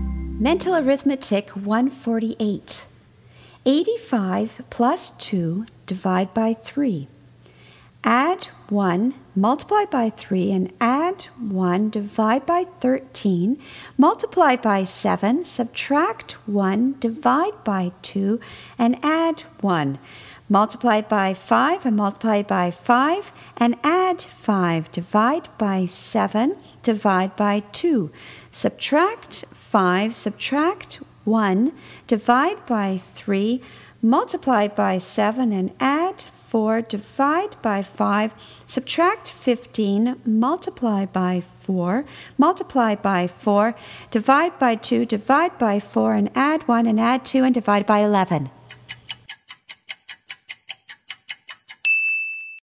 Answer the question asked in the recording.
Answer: And the answer is 1.